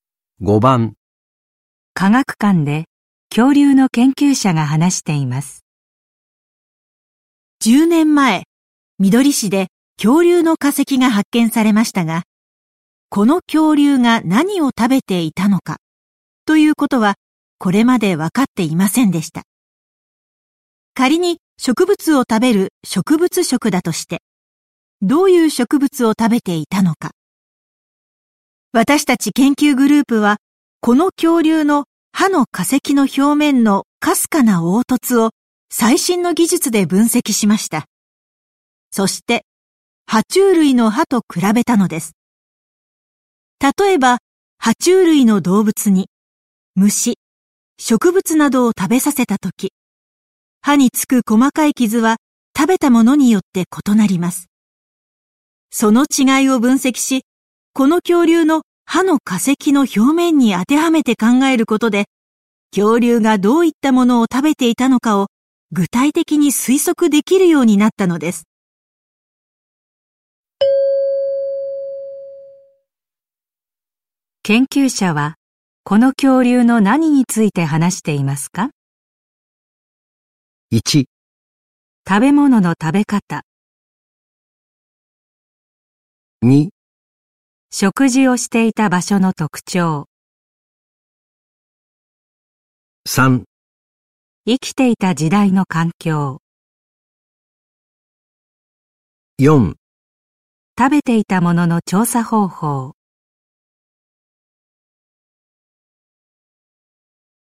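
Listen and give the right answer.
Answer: 4: 食べていたものの調査方法。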